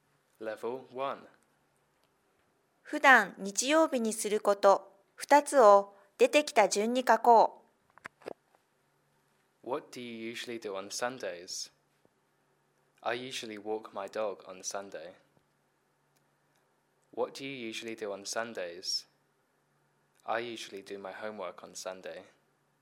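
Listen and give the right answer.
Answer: 犬の散歩(walk my dog)、宿題(do my homework)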